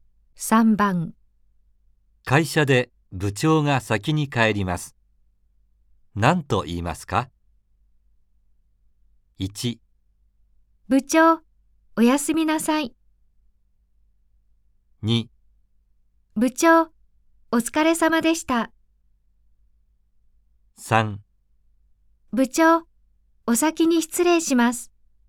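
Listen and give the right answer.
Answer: 2: 部長、お疲れ様でした。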